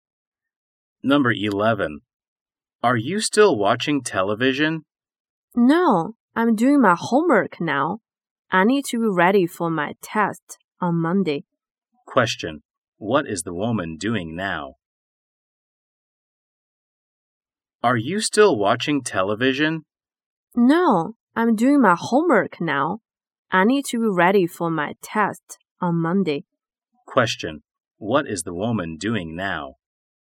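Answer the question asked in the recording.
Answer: Doing her homework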